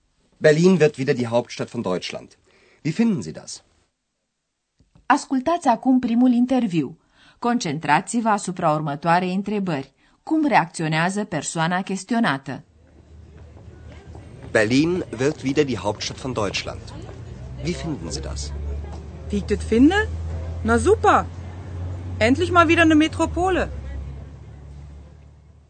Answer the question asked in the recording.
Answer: Persoana căreia îi se adresează Andreas își exprimă entuziasmul în pur dialect berlinez găsește grozav că Berlinul are devenit o metropolă.